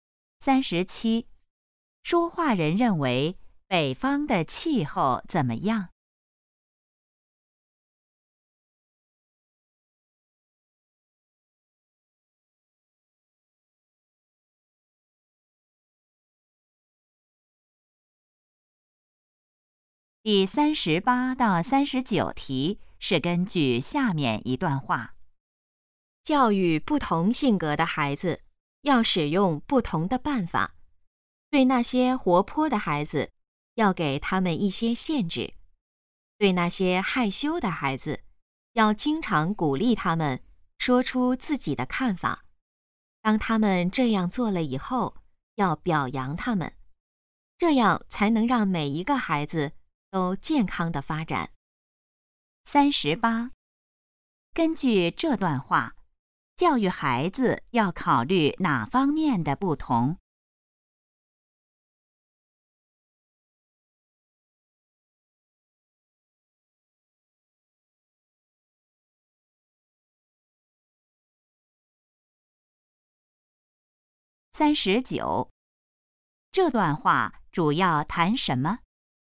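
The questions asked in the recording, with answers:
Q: 根据这段话,教育孩子要考虑哪方面的不同?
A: 性格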